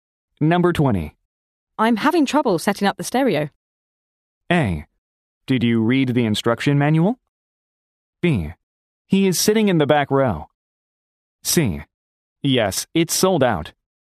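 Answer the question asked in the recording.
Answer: A: Did you read the instruction manual?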